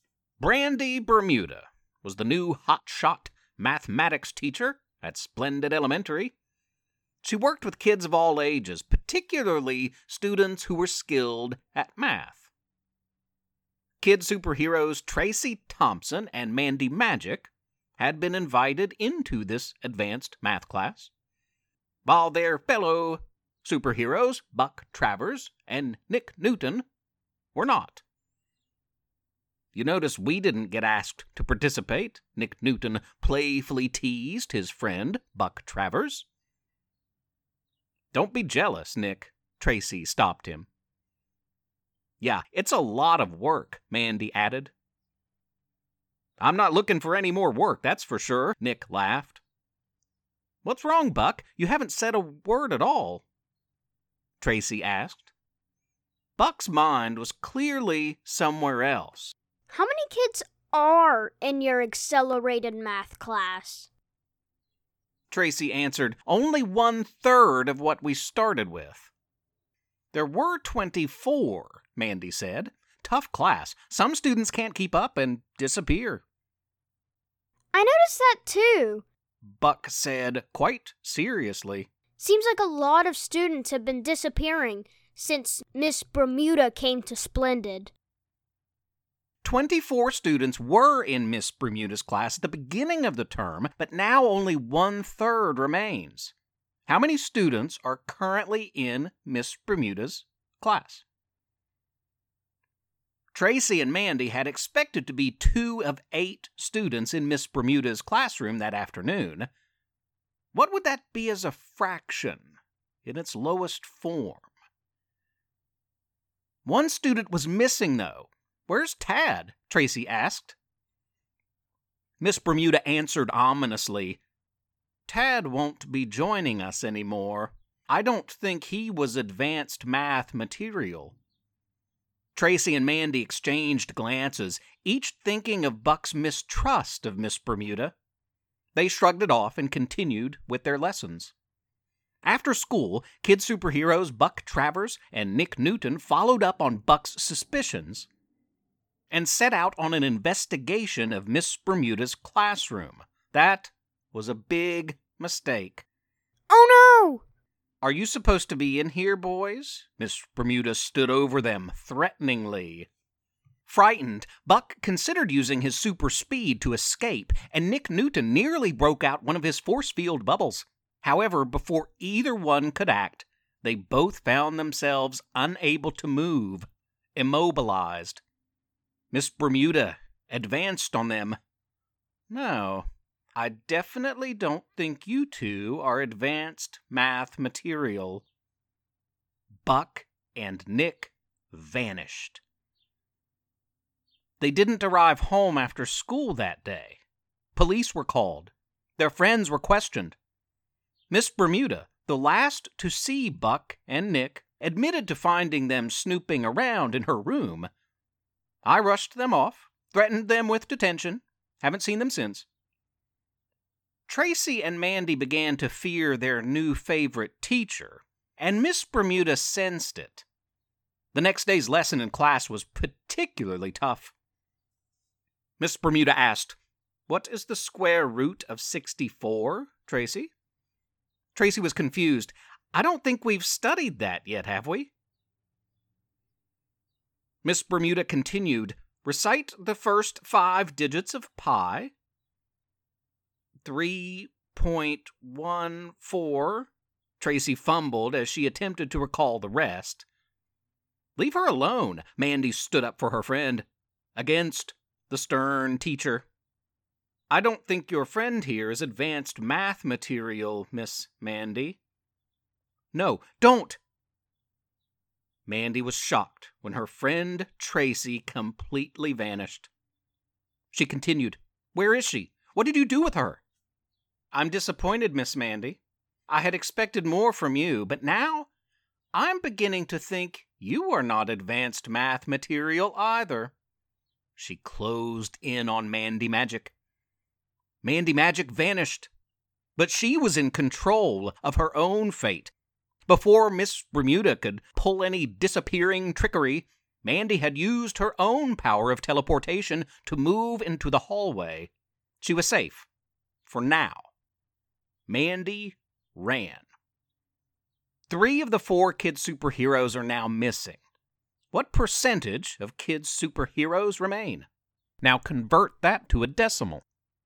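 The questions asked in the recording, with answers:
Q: What would that be as a fraction in its lowest form?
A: 1/4

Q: What percentage of kid superheroes remain?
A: 25%

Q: Now convert that to a decimal.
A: 0.25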